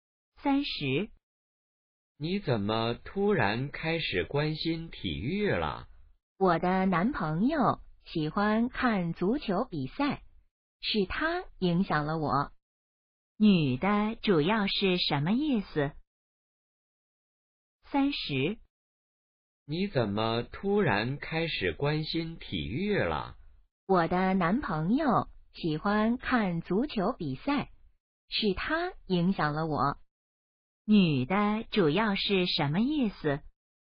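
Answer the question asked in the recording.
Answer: 男朋友让她开始关心体育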